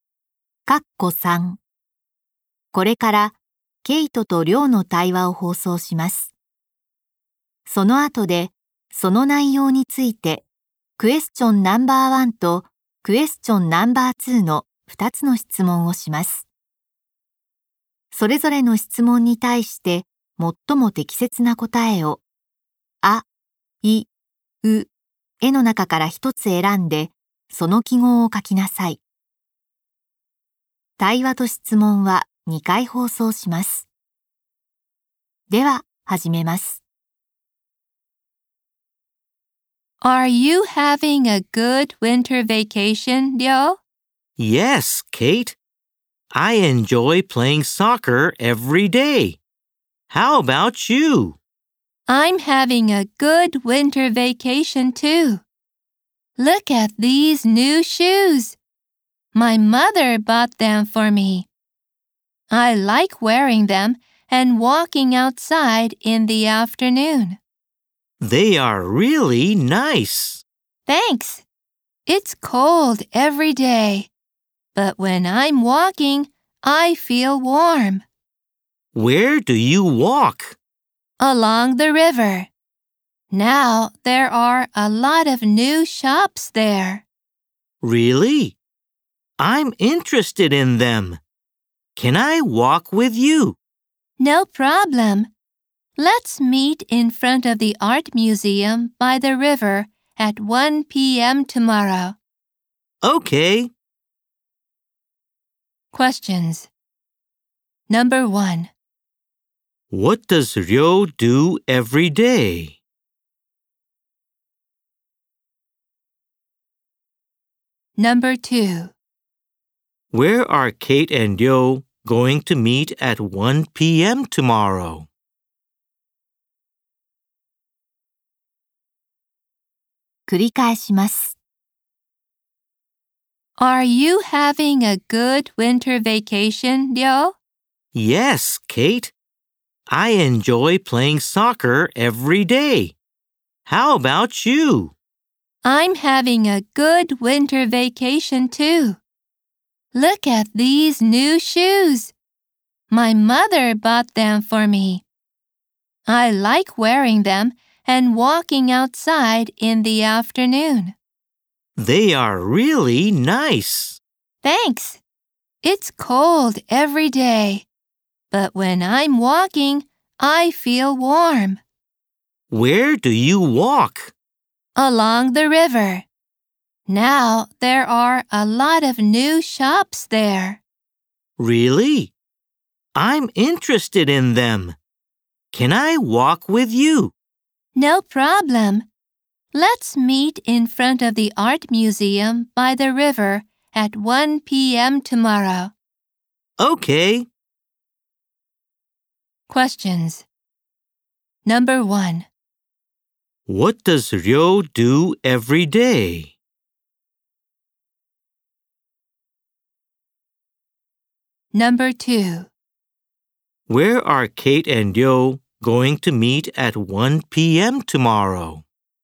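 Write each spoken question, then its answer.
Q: What does Ryo do every day?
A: He plays soccer

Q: Where are Kate and Ryo going to meet at 1 p.m.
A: In front of the art museum by the river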